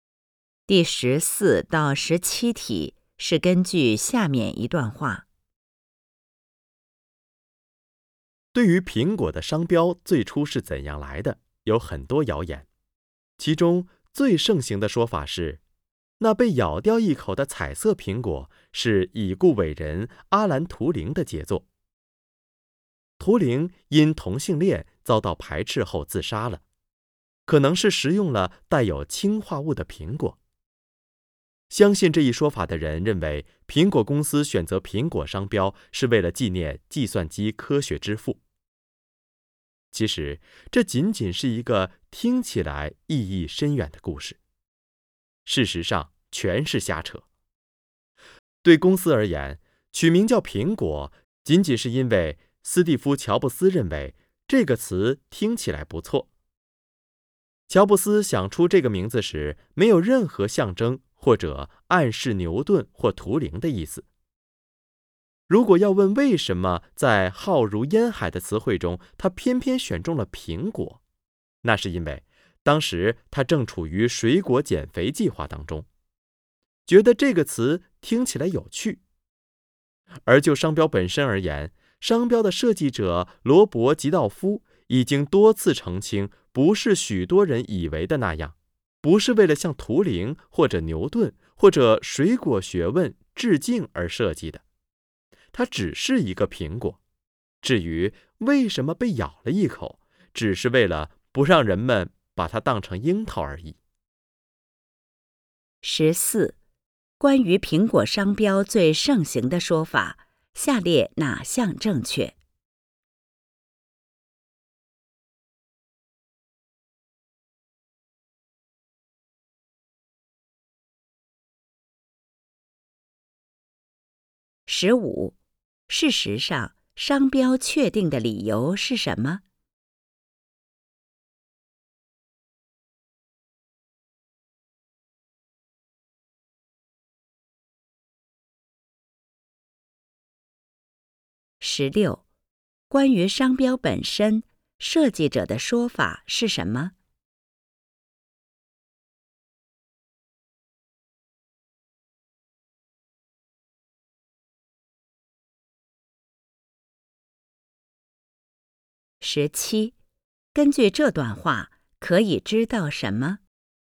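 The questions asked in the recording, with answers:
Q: 事实上,商标确定的理由是什么?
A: 乔布斯认为"苹果"这个词听起来不错

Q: 关于商标本身,设计者的说法是什么?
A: 它只是一个苹果,不是为了向图灵或牛顿致敬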